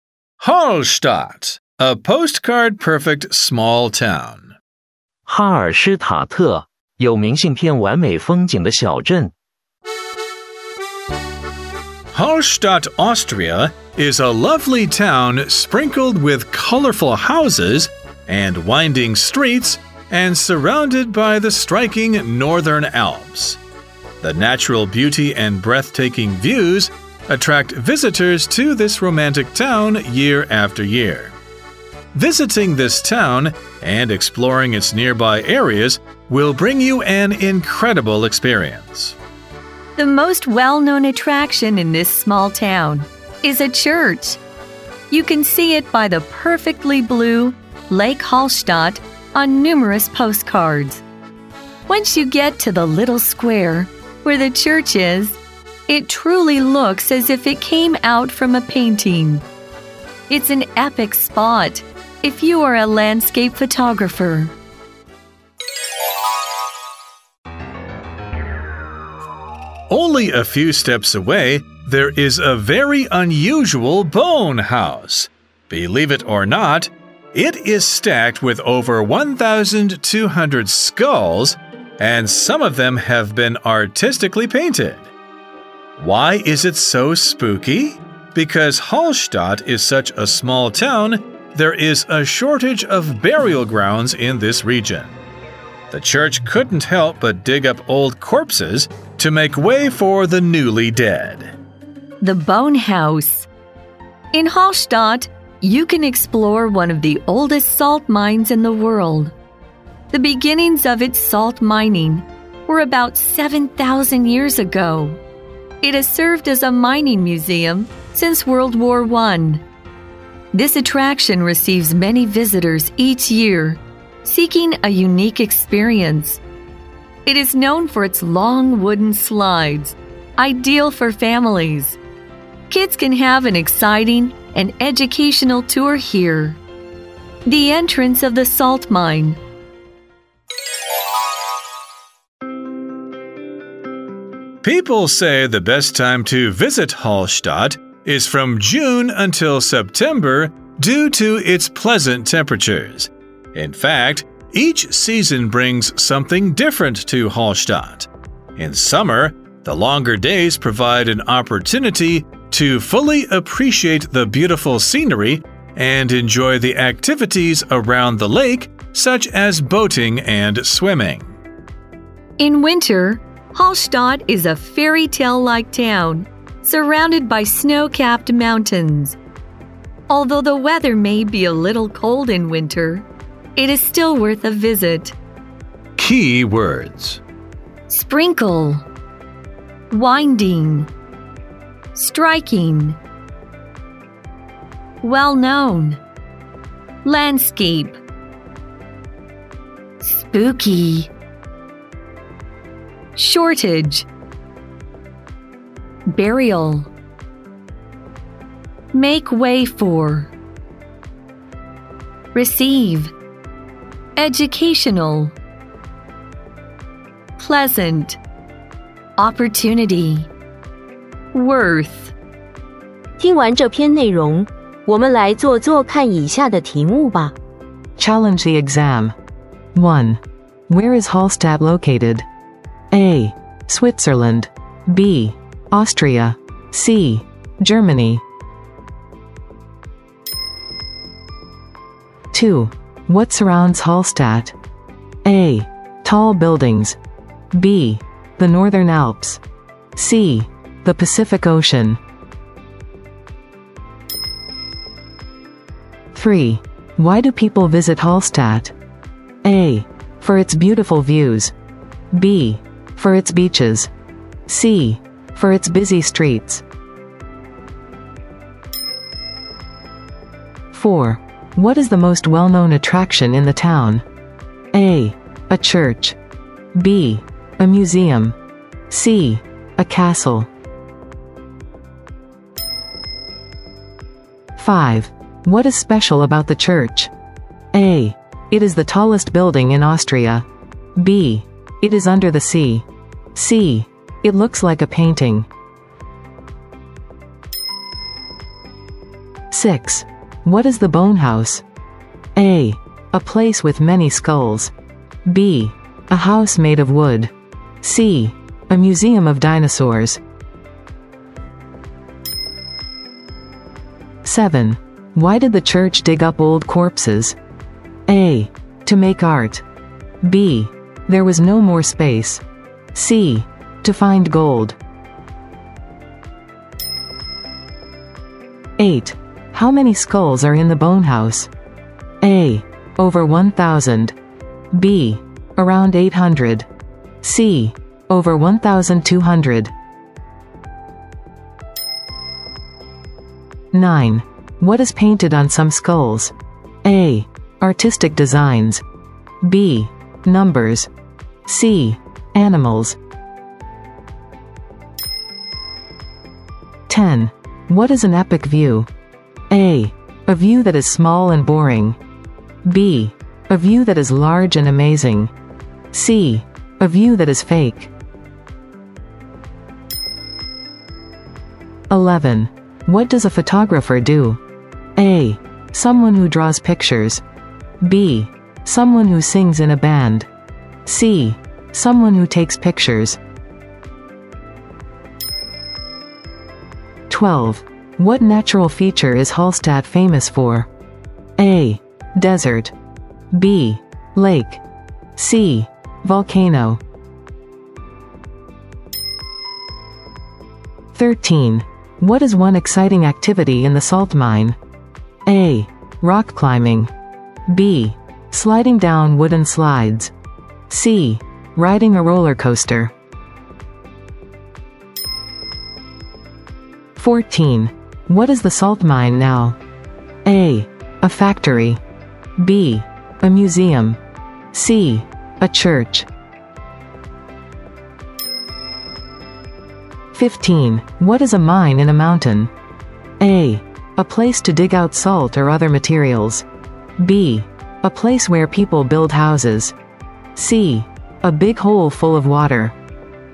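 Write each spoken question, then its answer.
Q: Where is Hallstatt located?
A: B: Austria.

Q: What surrounds Hallstatt?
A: B: The Northern Alps.

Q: Why do people visit Hallstatt?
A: A: For its beautiful views.

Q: What is the most well-known attraction in the town?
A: A: A church.

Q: What is special about the church?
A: C: It looks like a painting.

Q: What is the Bone House?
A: A: A place with many skulls.

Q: Why did the church dig up old corpses?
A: B: There was no more space.

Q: How many skulls are in the Bone House?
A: C: Over 1,200.

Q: What is painted on some skulls?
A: A: Artistic designs.

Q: What natural feature is Hallstatt famous for?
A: B: Lake.

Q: What is one exciting activity in the salt mine?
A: B: Sliding down wooden slides.

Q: What is the salt mine now?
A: B: A museum.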